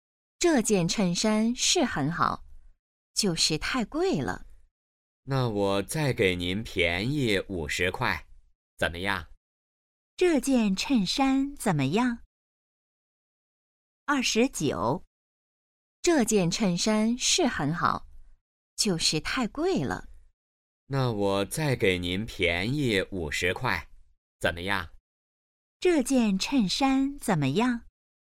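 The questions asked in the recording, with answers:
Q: 这件衬衫怎么样?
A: 很好,但是太贵了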